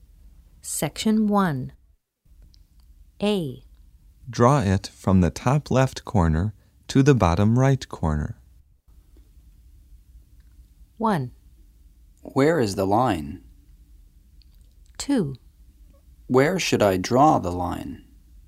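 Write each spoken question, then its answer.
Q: Draw it from the top left corner to the bottom right corner.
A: 2: Where should I draw the line?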